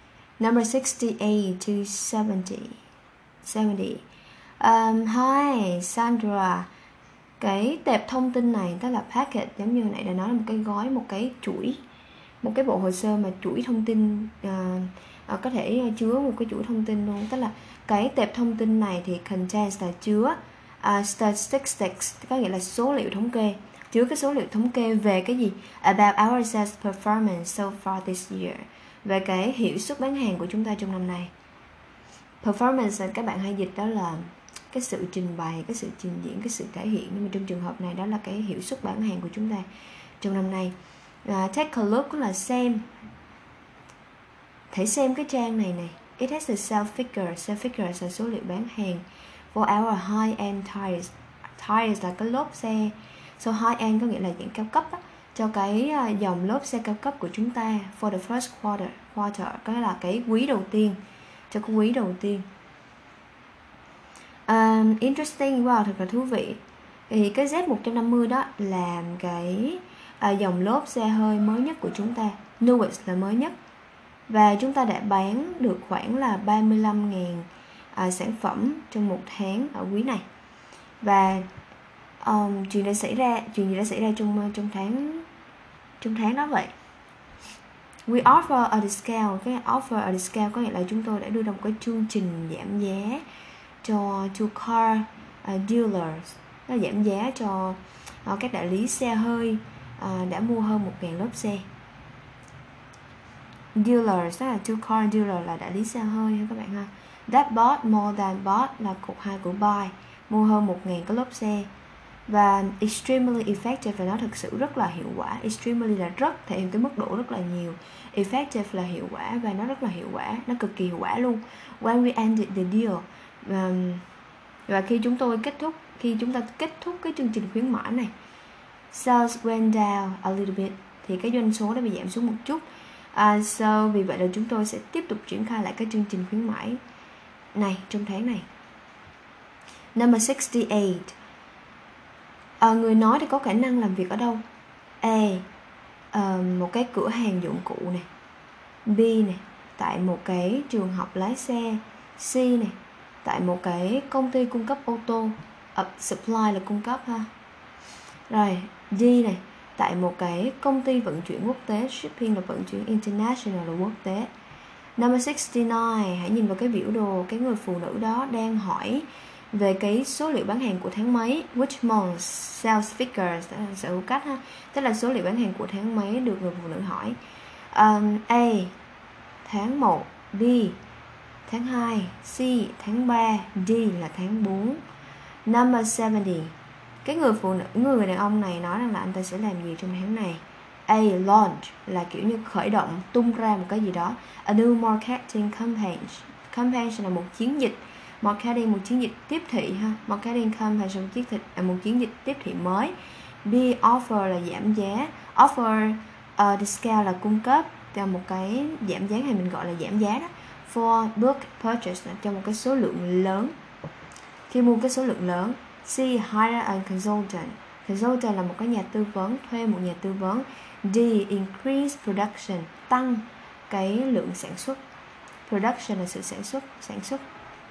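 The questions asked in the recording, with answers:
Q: Người nói thì có khả năng làm việc ở đâu?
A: C: tại một cái công ty cung cấp ô tô

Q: cái người đàn ông này nói rằng là anh ta sẽ làm gì trong tháng này.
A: B: offer discount for bulk purchase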